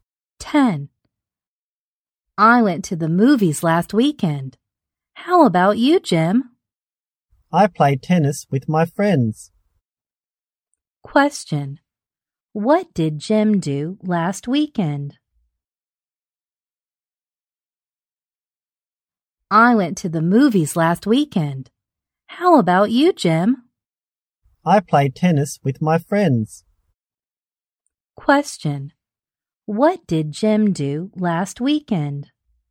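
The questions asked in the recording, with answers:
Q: What did Jim do last weekend?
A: He played tennis with his friends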